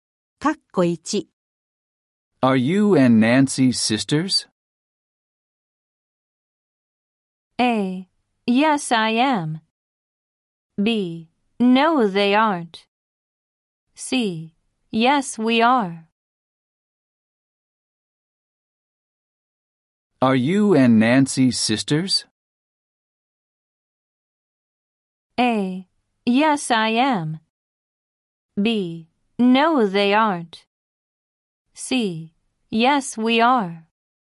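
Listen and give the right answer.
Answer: C: Yes, we are.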